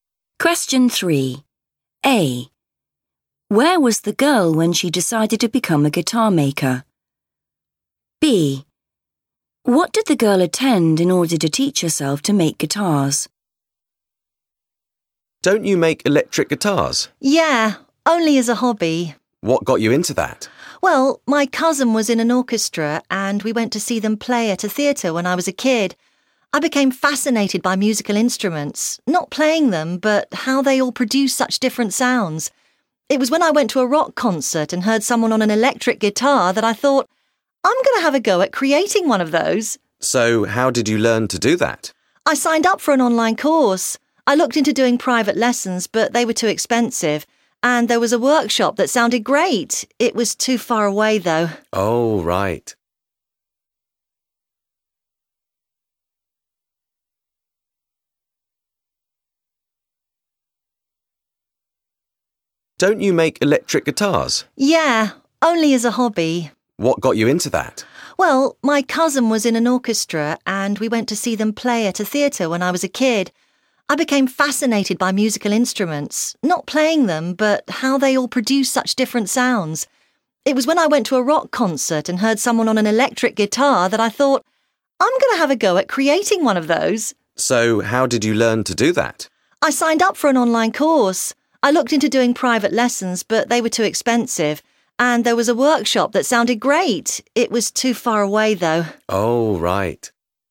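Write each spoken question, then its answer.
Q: Where was the girl when she decided to become a guitar maker?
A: at a rock concert

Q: What did the girl attend in order to teach herself to make guitars?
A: an online course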